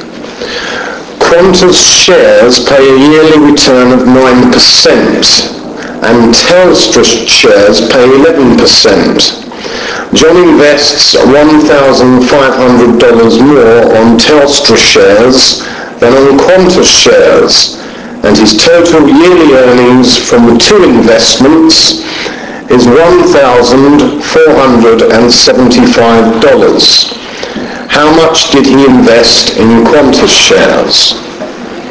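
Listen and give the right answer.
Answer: $6,550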